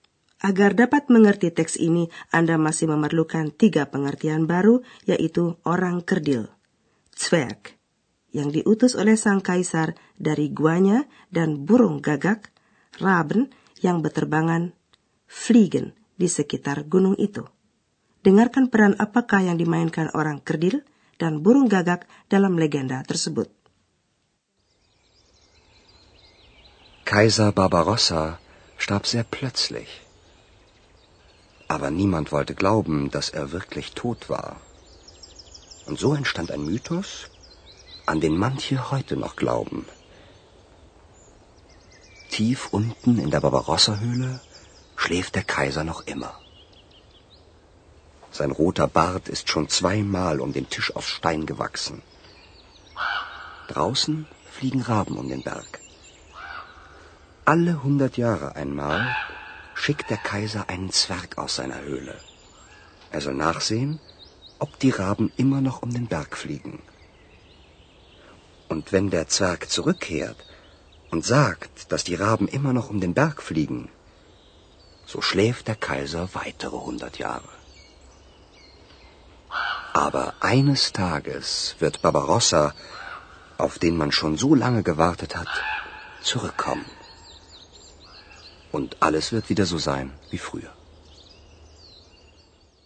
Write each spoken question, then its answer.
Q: Dengarkan peran apakah yang dimainkan orang kerdil dan burung gagak dalam legenda tersebut.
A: orang kerdil itu ditugaskan memantau apakah burung-burung gagak masih tetap terbang mengitari gunung.